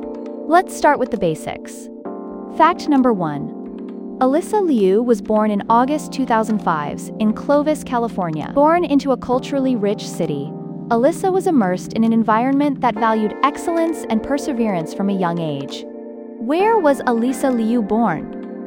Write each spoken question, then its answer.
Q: Where was Alyssa Liu born?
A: Correct answer, Clovis, California.